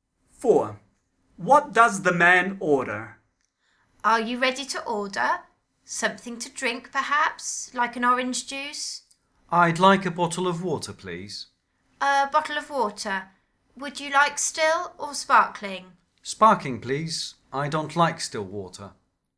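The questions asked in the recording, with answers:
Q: What does the man order?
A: a bottle of sparkling water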